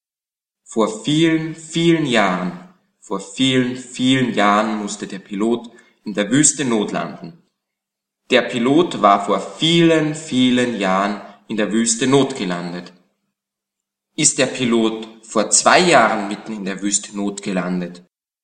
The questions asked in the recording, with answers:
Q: Ist der Pilot vor 2 Jahren mitten in der Wüste notgelandet?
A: Nein, nicht vor 2 Jahren.